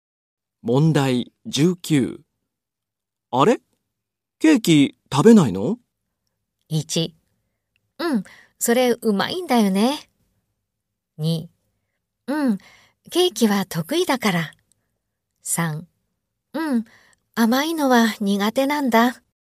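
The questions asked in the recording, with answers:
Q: あれ?ケーキ食べないの?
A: 1: うん、甘いのは苦手なんだ。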